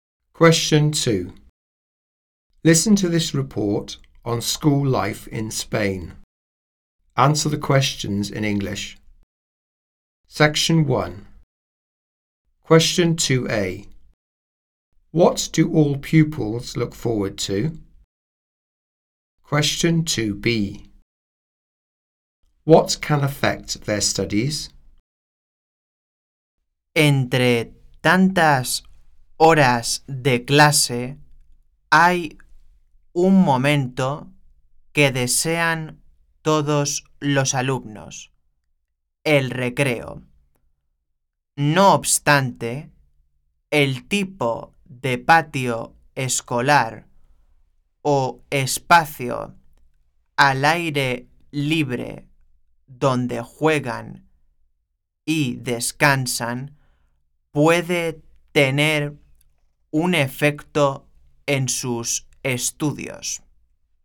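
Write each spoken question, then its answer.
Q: What do all pupils look forward to?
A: Break time

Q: What can affect their studies?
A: The type of playground or outdoor space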